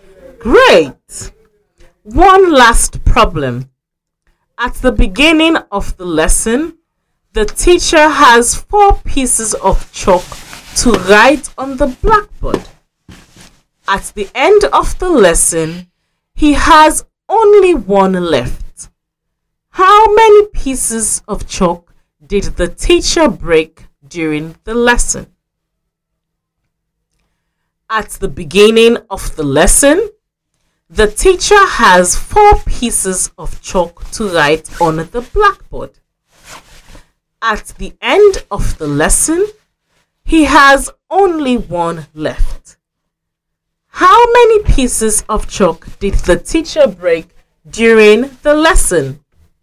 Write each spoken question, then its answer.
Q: How many pieces of chalk did the teacher break during the lesson?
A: I wrote down 4 minus 3 equals 1.